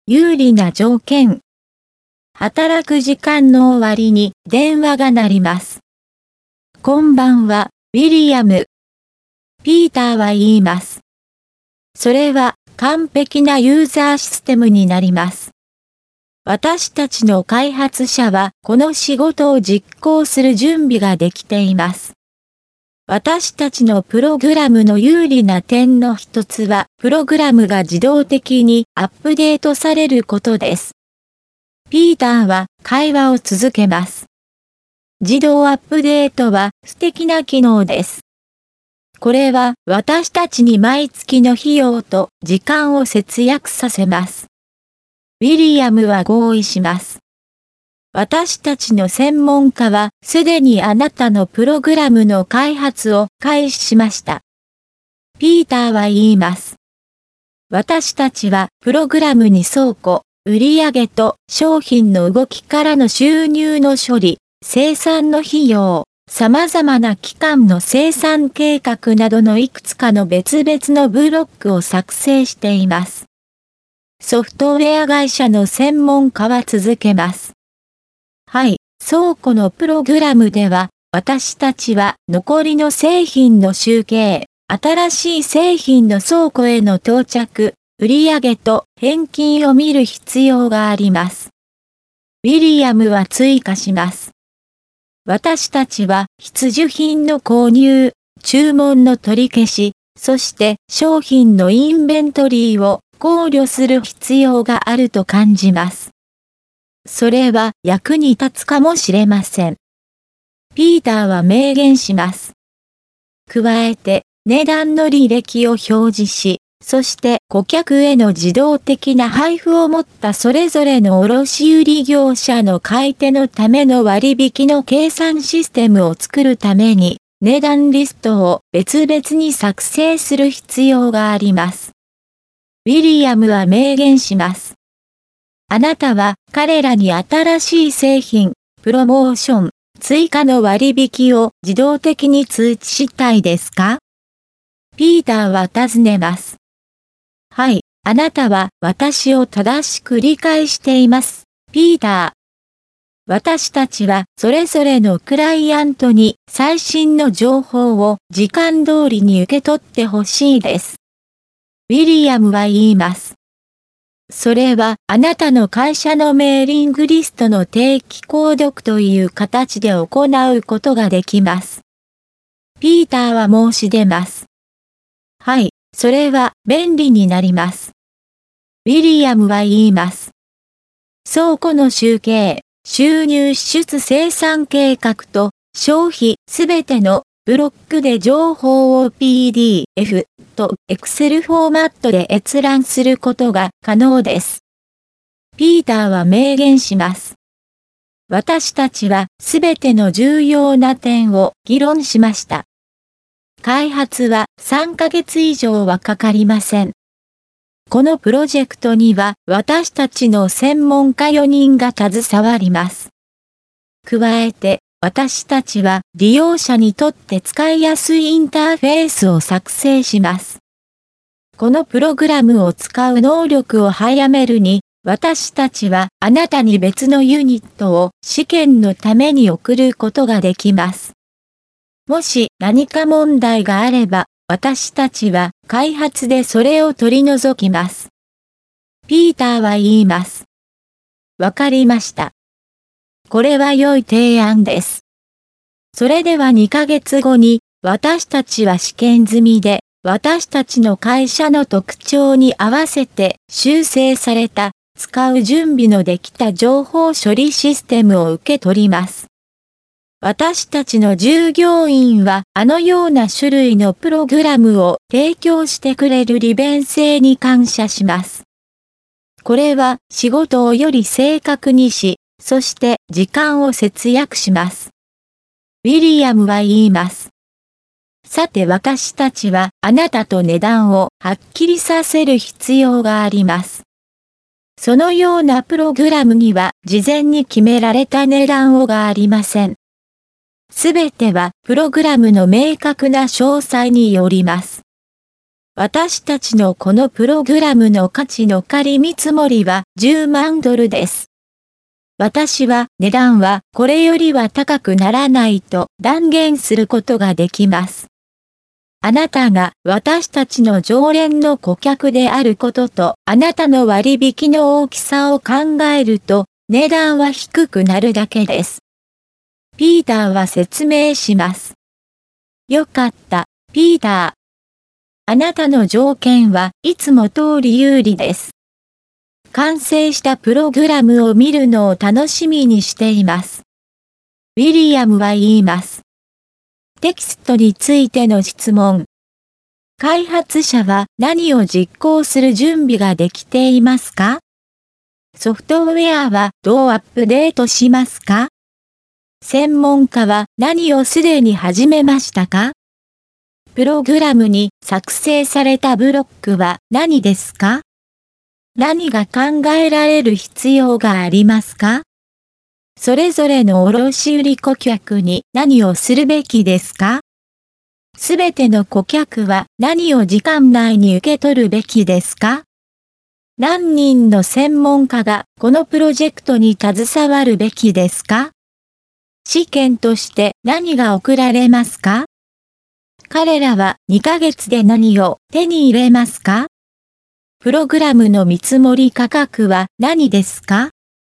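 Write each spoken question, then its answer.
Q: 開発者は何を実行する準備ができていますか?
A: この仕事(ユーザーシステムの開発)

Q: ソフトウェアはどうアップデートしますか?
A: 自動的に

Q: 専門家は何をすでに始めましたか?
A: プログラムの開発

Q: プログラムに作成されたブロックは何ですか?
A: 倉庫、売上と商品の動きからの収入の処理、生産の費用、様々な期間の生産計画

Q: 何が考えられる必要がありますか?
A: 必需品の購入、注文の取り消し、商品のインベントリー

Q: すべての顧客は何を時間内に受け取るべきですか?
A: 最新の情報

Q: 何人の専門家がこのプロジェクトに携わるべきですか?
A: 4人

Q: 試験として何が送られますか?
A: 別のユニット

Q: 彼らは2ヶ月で何を手に入れますか?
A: 試験済みで修正された、使う準備のできた情報処理システム

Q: プログラムの見積もり価格は何ですか?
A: 10万ドル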